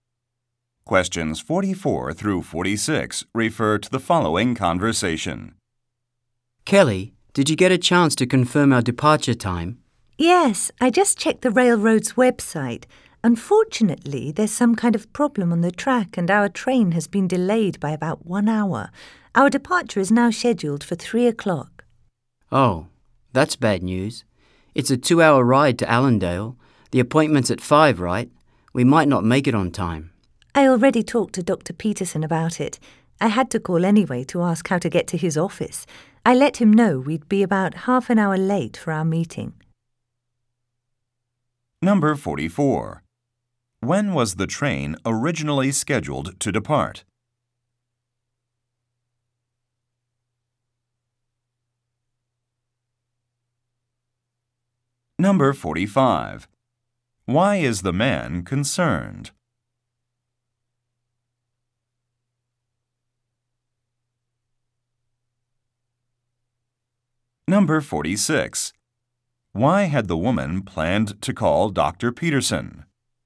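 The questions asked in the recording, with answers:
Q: When was the train originally scheduled to depart?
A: At 2 o'clock

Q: Why is the man concerned?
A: They might be late for their appointment

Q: Why had the woman planned to call Dr.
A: To ask how to get to his office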